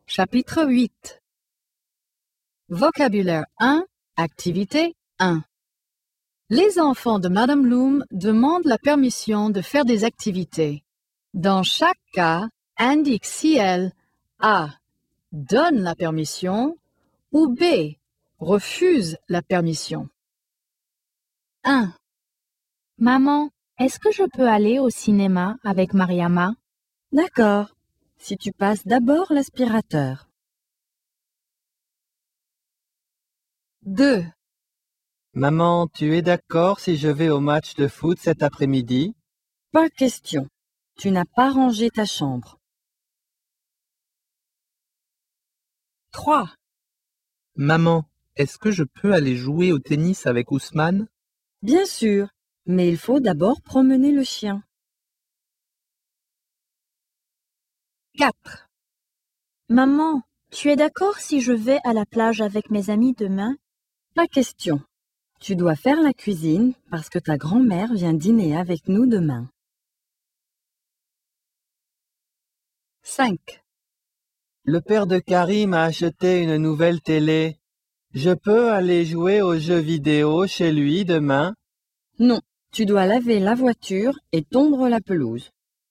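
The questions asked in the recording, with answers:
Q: Maman, est-ce que je peux aller au cinéma avec Mariama?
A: A: donne la permission

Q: Maman, tu es d'accord si je vais au match de foot cet après-midi?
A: B: refuse la permission

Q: Maman, est-ce que je peux aller jouer au tennis avec Ousmane?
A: A: donne la permission

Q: Maman, tu es d'accord si je vais à la plage avec mes amis demain?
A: B: refuse la permission

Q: Je peux aller jouer aux jeux vidéo chez lui demain?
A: B: refuse la permission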